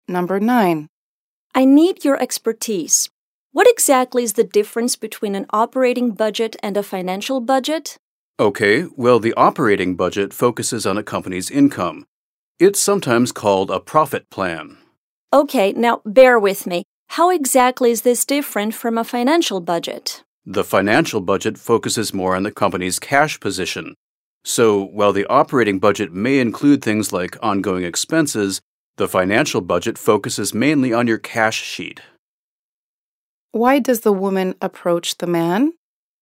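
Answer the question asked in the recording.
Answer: To ask him about the difference between an operating budget and a financial budget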